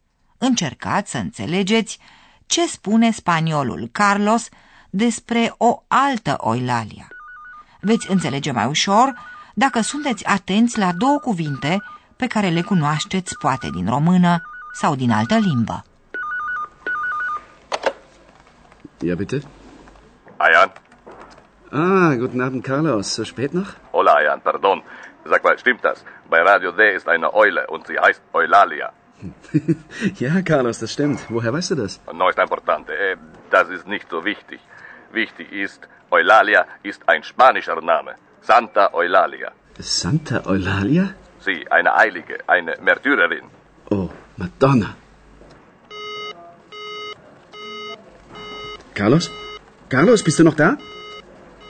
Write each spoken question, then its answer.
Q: Încercați să înțelegeți ce spune spaniolul Carlos despre o altă Oilalia.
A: El vorbește de Santa Oilalia, Sfânta Oilalia.